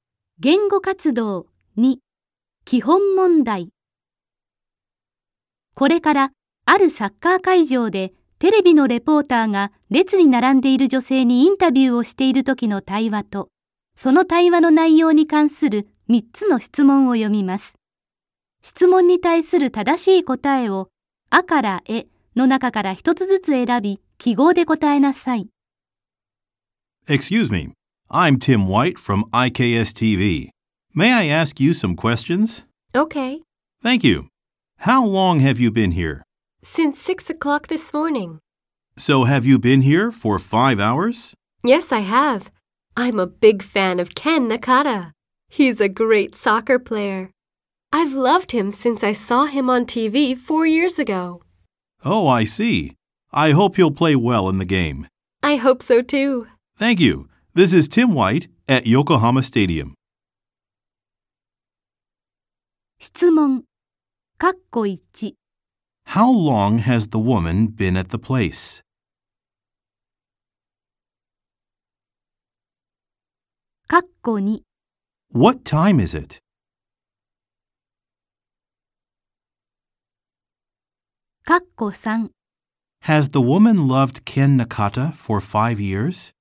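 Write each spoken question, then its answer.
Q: How long has the woman been at the place?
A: For five hours.

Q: What time is it?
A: It's eleven o'clock.

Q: Has the woman loved Ken Nakata for 5 years?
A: No, she hasn't. (For four years.)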